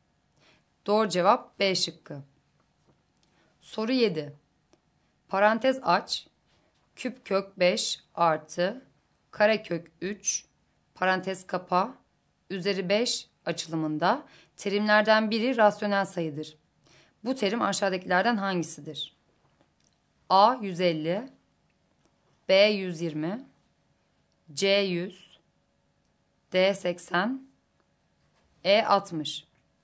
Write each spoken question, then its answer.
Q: Bu terim aşağıdakilerden hangisidir?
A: Doğru cevap A şıkkı.